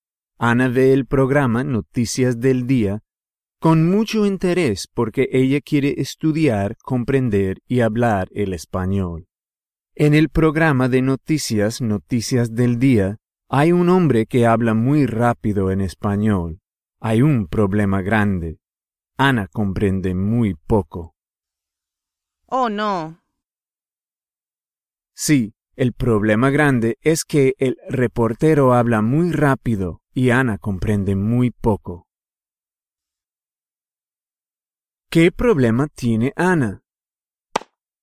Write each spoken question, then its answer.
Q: ¿Qué problema tiene Ana?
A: En el programa Noticias del Día, hay un hombre que habla muy rápido en español y Ana comprende muy poco.